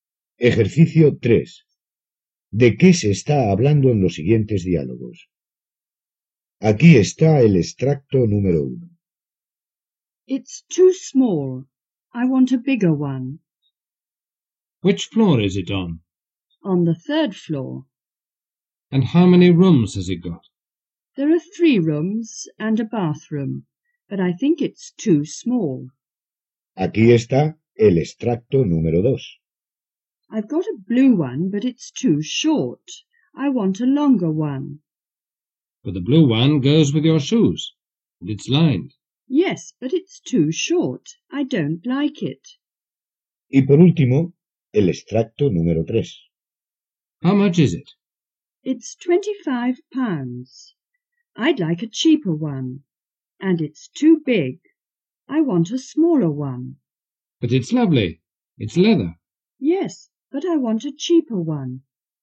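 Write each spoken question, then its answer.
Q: ¿De qué se está hablando en los siguientes diálogos?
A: De un piso (apartamento)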